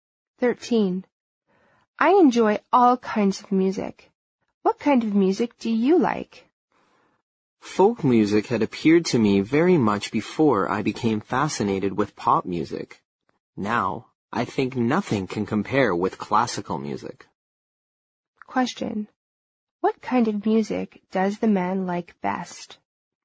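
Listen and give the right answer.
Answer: Classical music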